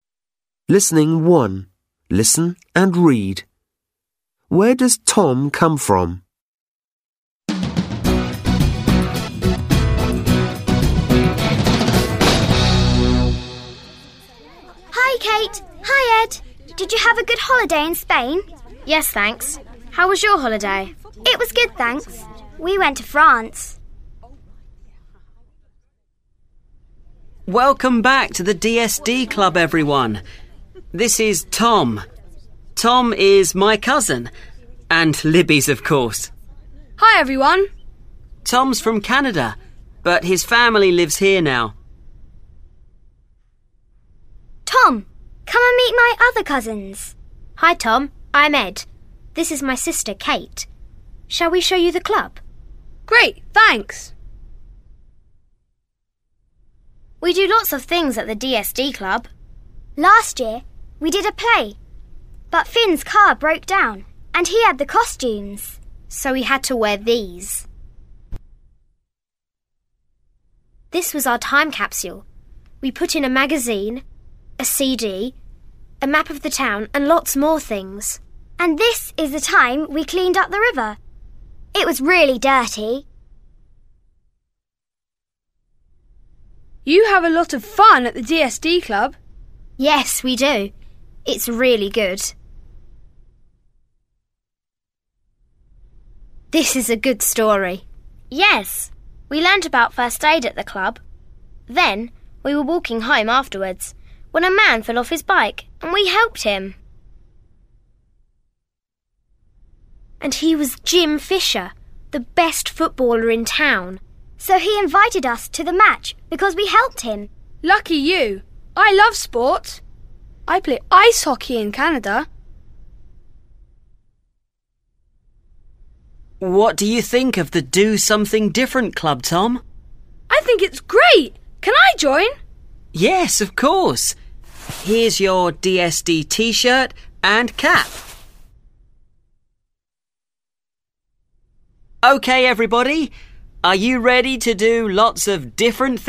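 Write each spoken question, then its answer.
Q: Where does Tom come from?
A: Canada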